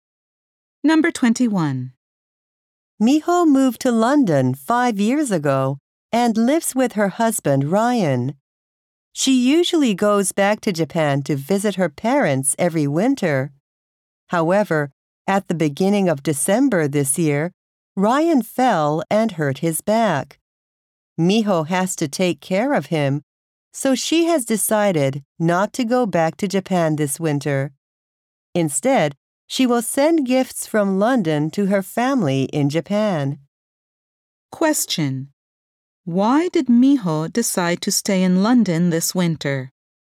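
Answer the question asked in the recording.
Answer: She has to take care of her husband, who hurt his back.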